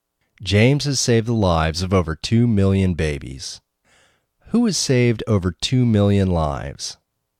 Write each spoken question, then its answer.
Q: Who has saved over 2 million lives?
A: James Harrison has saved over 2 million lives.